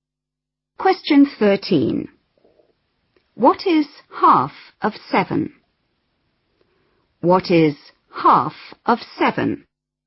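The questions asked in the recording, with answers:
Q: What is half of 7?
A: 3.5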